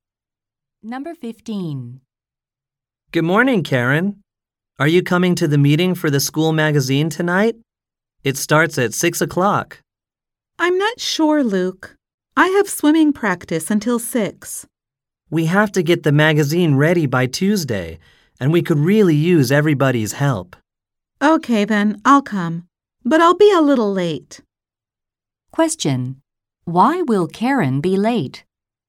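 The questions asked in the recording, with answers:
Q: Why will Karen be late?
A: She has swimming practice until 6.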